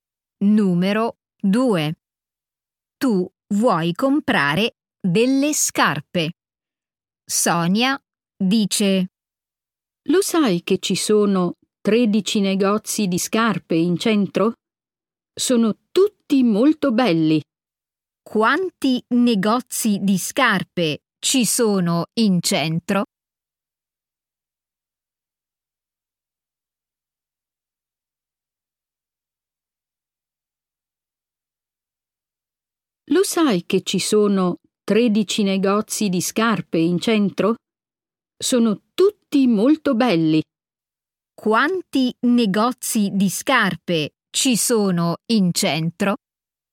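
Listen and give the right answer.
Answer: 13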